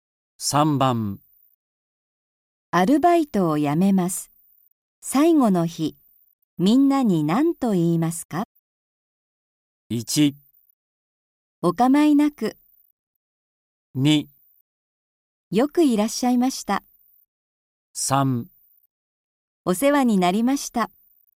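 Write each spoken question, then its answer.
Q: アルバイトを辞めます。最後の日、みんなに何と言いますか?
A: 3: お世話になりました。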